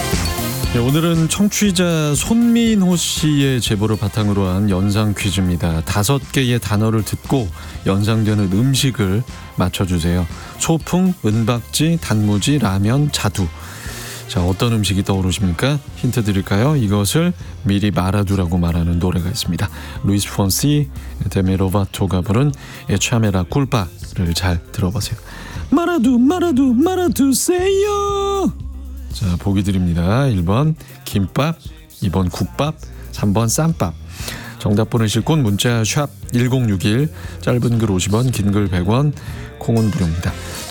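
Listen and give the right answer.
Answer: 1번: 김밥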